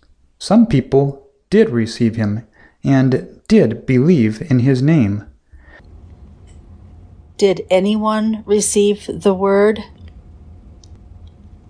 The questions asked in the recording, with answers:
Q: Did anyone receive the Word?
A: Yes, some people did receive him.